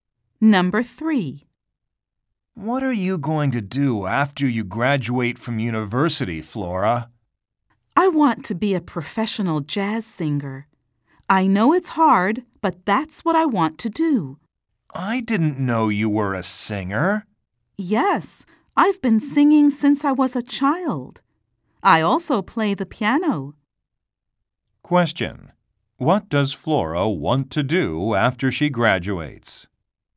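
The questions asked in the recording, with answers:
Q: What does Flora want to do after she graduates?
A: Be a professional jazz singer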